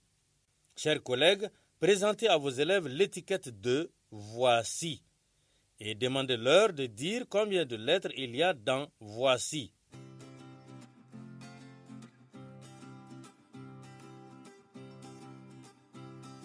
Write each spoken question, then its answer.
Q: demandez-leur de dire combien de lettres il y a dans « voici ».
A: J'espère que vous avez dit qu'il y a cinq lettres dans le mot « voici ».